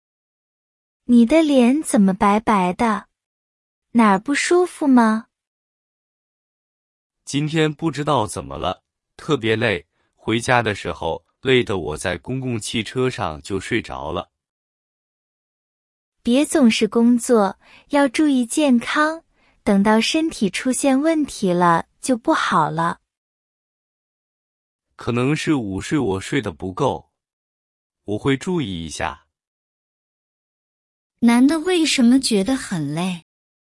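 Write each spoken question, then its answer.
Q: 男的为什么觉得很累?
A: 午睡睡得不够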